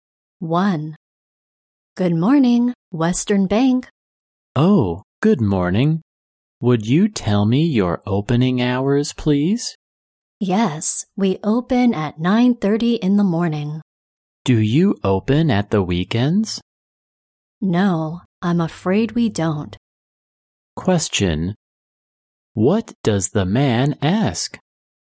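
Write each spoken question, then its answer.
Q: What does the man ask?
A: The bank's opening hours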